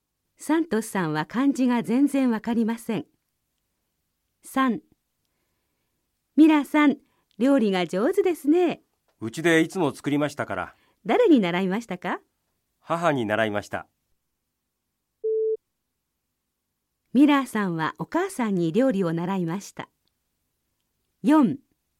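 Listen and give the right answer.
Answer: はい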